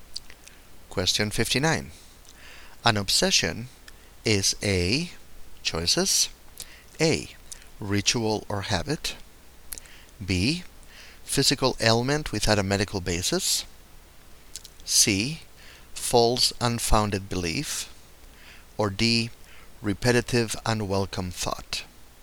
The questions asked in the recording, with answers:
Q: An obsession is A.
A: And the correct choice is D. Repetitive unwelcome thought.